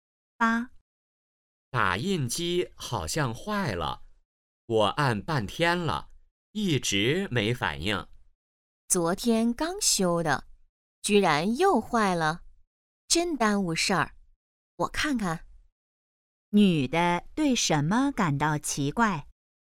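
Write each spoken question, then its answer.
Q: 女的对什么感到奇怪?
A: 打印机昨天刚修又坏了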